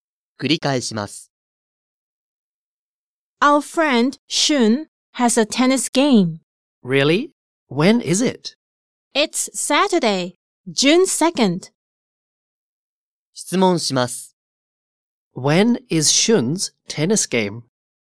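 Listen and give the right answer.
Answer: Saturday, June 2nd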